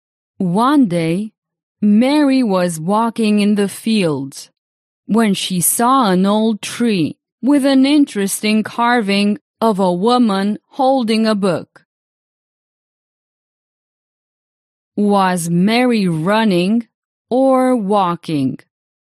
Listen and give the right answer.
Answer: Walking. Mary was walking.